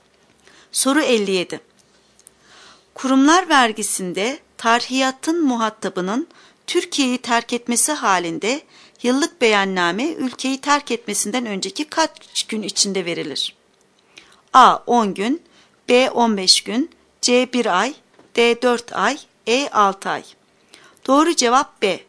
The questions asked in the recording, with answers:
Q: Kurumlar vergisinde tarhiyatın muhatabının Türkiye'yi terk etmesi halinde yıllık beyanname ülkeyi terk etmesinden önceki kaç gün içinde verilir?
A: Doğru cevap B.